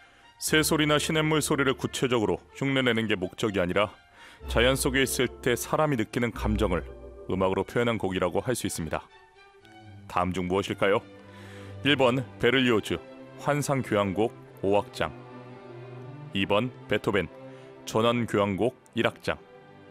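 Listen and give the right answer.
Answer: 2: 베토벤 전원교향곡 1악장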